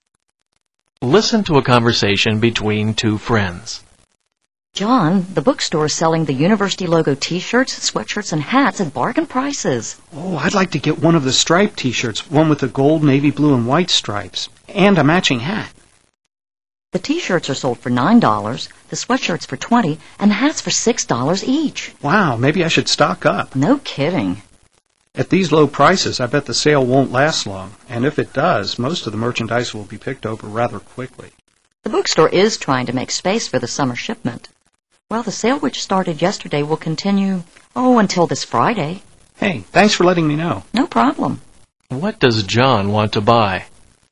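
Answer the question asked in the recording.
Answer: A striped t-shirt and a matching hat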